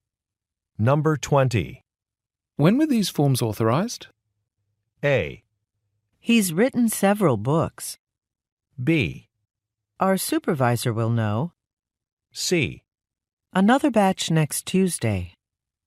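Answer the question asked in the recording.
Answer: B: Our supervisor will know.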